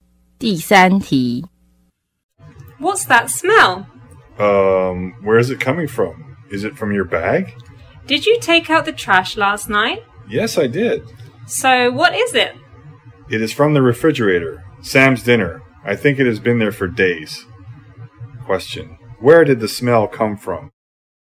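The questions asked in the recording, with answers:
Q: Where did the smell come from?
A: The refrigerator (Sam's old dinner)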